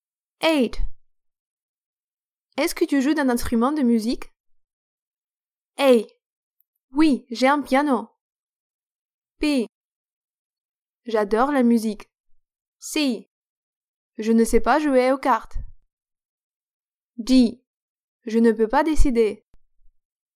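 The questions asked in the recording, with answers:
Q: Est-ce que tu joues d'un instrument de musique?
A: A: Oui, j'ai un piano.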